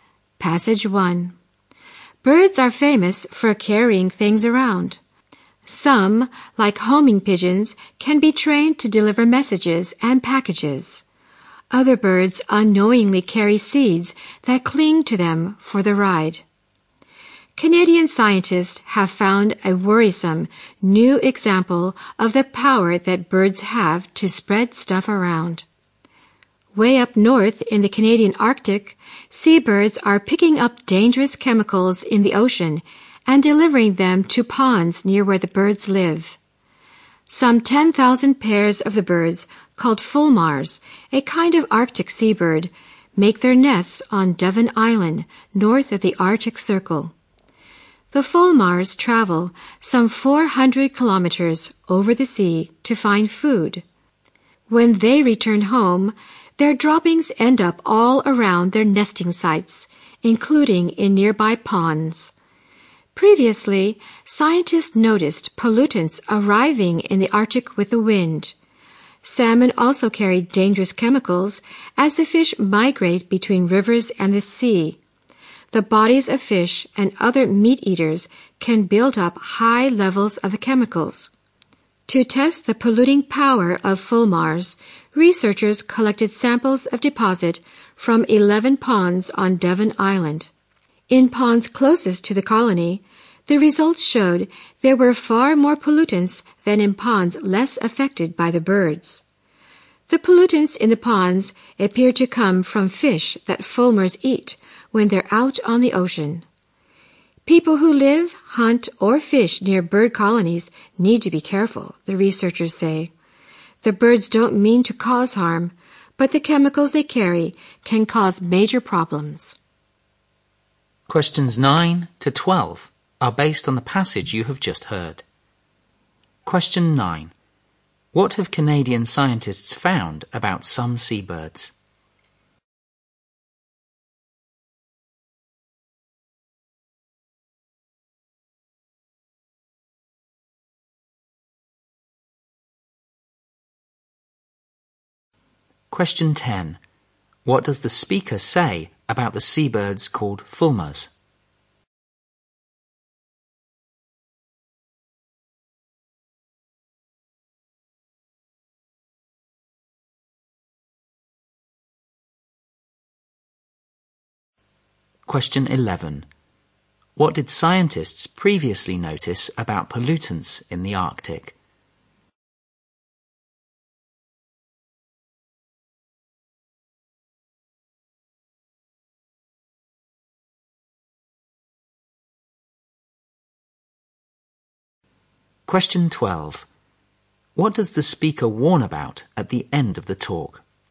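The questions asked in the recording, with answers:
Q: What have Canadian scientists found about some seabirds?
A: They carry dangerous chemicals from the ocean to ponds near their homes.

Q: What did scientists previously notice about pollutants in the Arctic?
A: They arrived with the wind.

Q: What does the speaker warn about at the end of the talk?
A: People living, hunting or fishing near bird colonies need to be careful.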